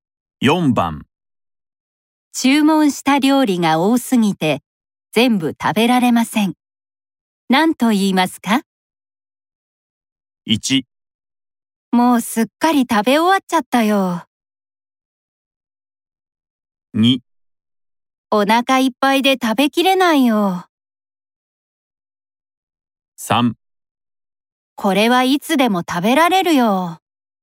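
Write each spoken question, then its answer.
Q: 注文した料理が多すぎて全部食べられません。何と言いますか?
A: 2: お腹いっぱいで食べきれないよ。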